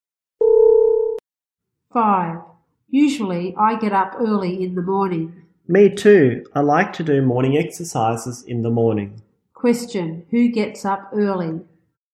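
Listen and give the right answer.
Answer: Both of them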